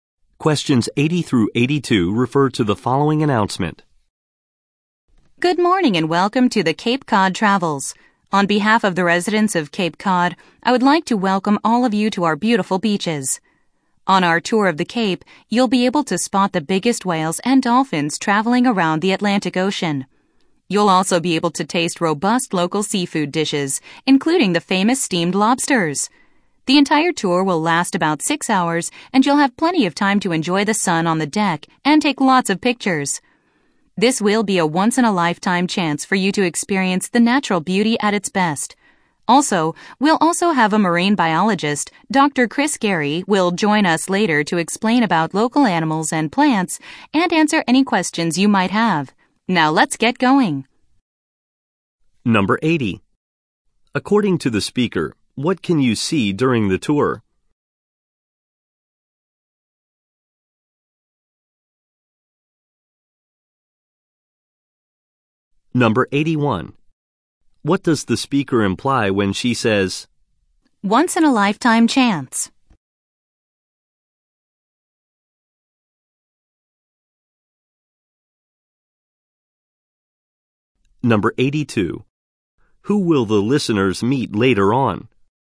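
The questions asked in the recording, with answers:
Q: According to the speaker, what can you see during the tour?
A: Whales and dolphins

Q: Who will the listeners meet later on?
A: A marine biologist, Dr. Chris Gary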